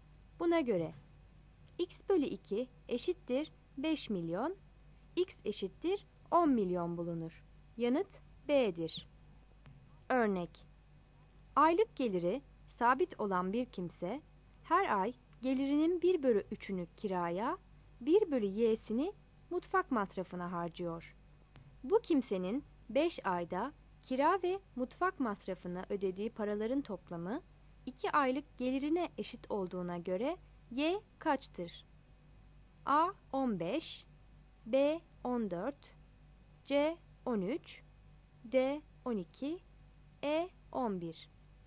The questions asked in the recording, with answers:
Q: Bu kimsenin 5 ayda Kira ve mutfak masrafına ödediği paraların toplamı 2 aylık gelirine eşit olduğuna göre Y kaçtır?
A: Yanıt A'dır.